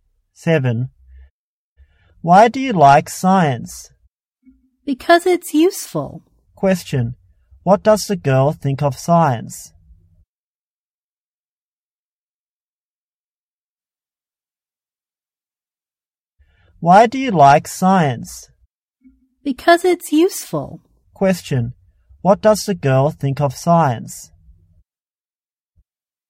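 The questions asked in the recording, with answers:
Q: Question, what does the girl think of science?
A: It's useful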